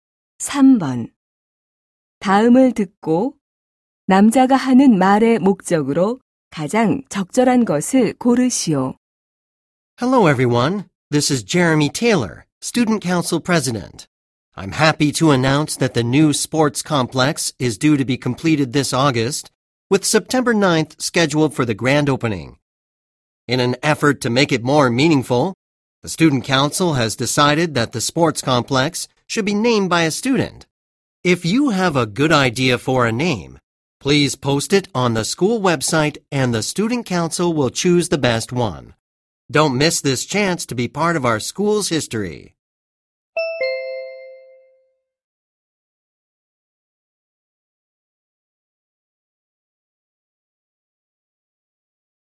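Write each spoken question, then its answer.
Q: 다음을 듣고 남자가 하는 말의 목적으로 가장 적절한 것을 고르시오.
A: 새 체육관 이름 공모를 알리려고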